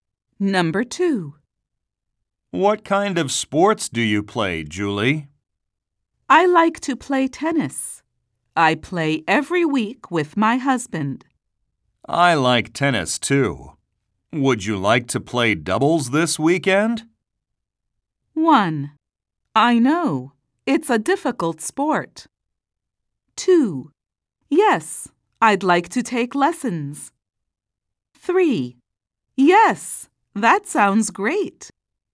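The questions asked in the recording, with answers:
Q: Would you like to play doubles this weekend?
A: 3: Yes, that sounds great.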